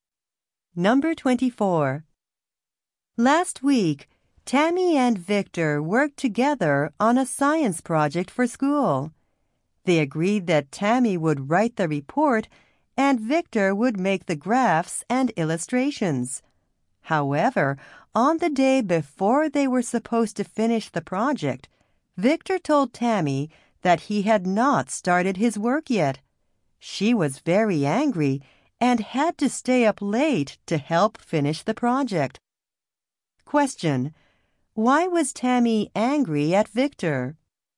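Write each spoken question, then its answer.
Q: Why was Tammy angry at Victor?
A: He had not started his part of the project.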